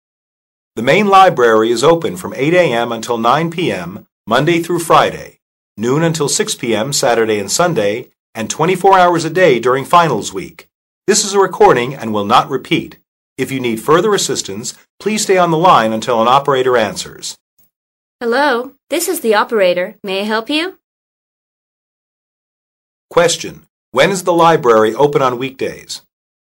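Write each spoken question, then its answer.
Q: When is the library open on weekdays?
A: From 8 a.m. until 9 p.m.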